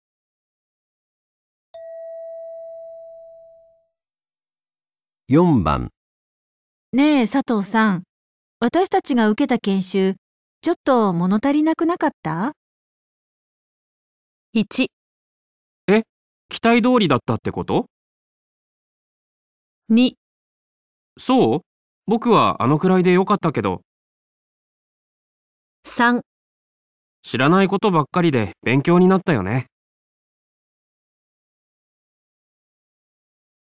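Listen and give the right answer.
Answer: そう、僕はあのくらいでよかったけど

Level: N2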